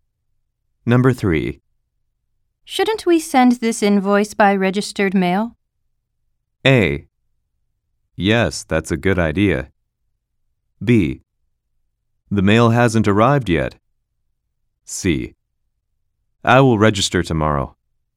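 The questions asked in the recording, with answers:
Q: Shouldn't we send this invoice by registered mail?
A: A: Yes, that's a good idea.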